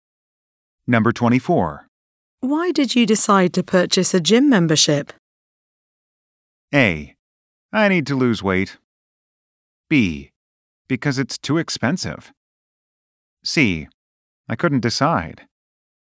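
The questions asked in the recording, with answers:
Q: Why did you decide to purchase a gym membership?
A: A: I need to lose weight.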